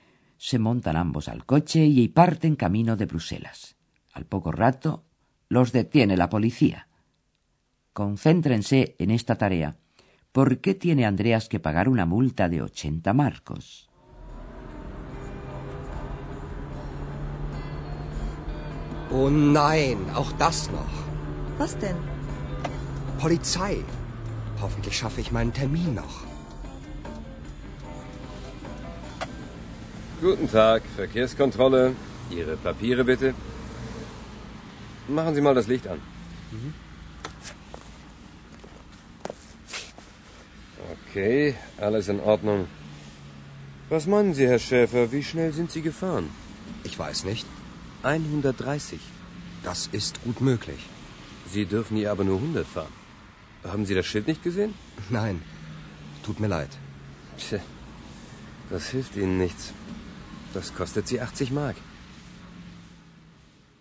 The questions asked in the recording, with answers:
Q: ¿Por qué tiene Andreas que pagar una multa de 80 marcos?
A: Andreas tiene que pagar una multa de 80 marcos porque iba conduciendo a excesiva velocidad.